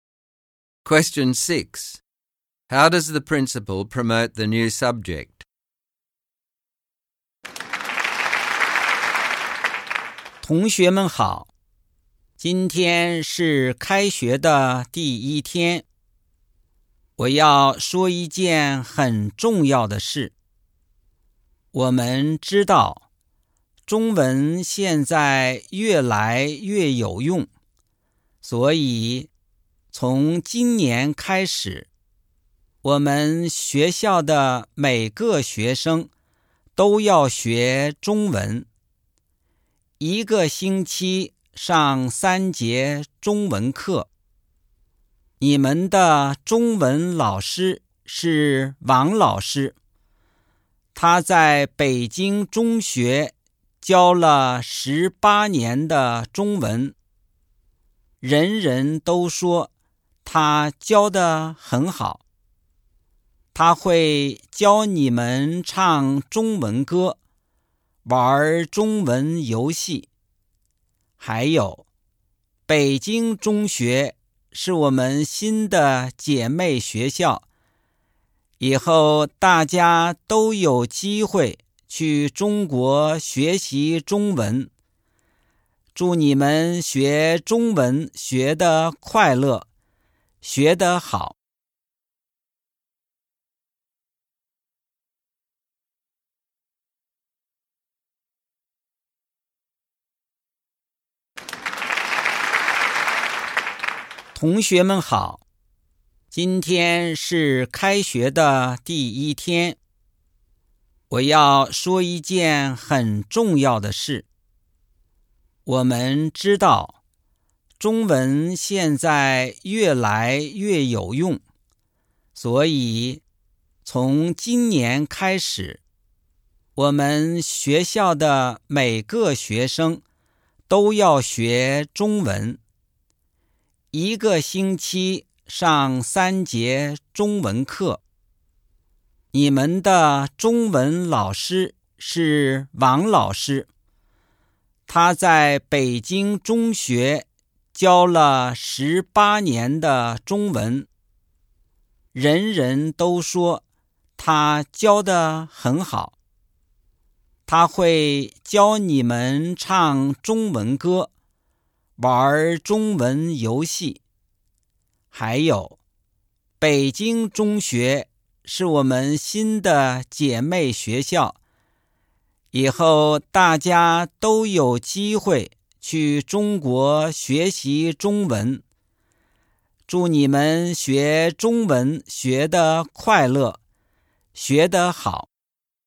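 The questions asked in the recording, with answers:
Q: How does the principal promote the new subject?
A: He says Chinese is increasingly useful. He praises the experienced teacher, Mr Wang, who has taught for 18 years and will teach songs and games. He says students will have the chance to study in China through the new sister school.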